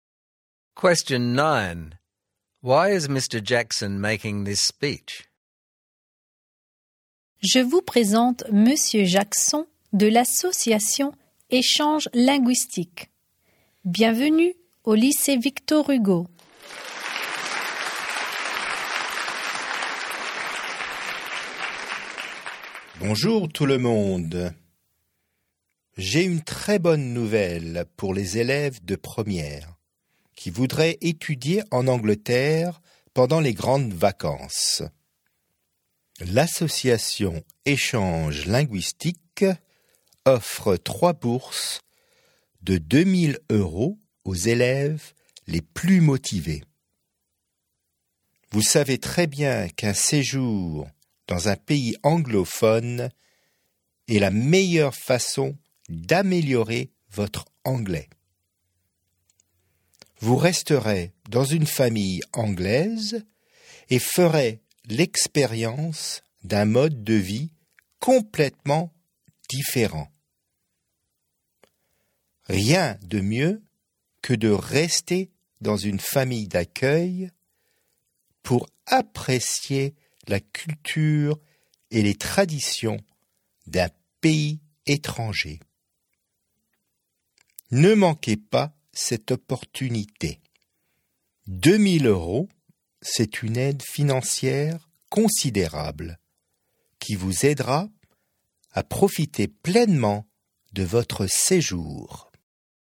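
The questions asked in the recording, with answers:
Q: Why is Mr. Jackson making this speech?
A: To announce three 2000-euro scholarships for students to study in England during the summer holidays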